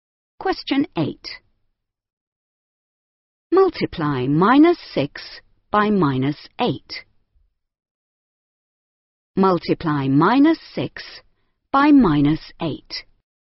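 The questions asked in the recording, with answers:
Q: Multiply minus 6 by minus 8.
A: 48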